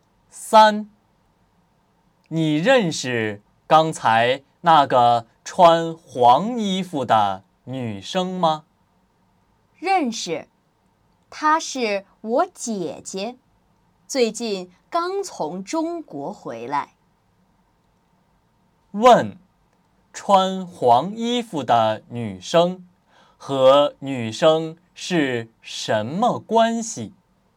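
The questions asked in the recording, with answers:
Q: 问, 穿黄衣服的女生和女生是什么关系?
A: 姐妹(她是女生的姐姐)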